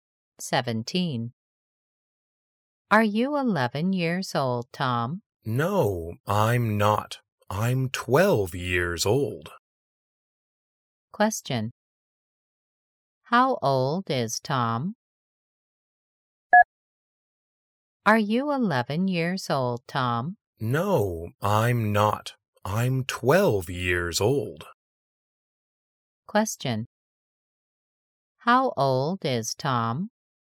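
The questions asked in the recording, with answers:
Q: How old is Tom?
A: 12 years old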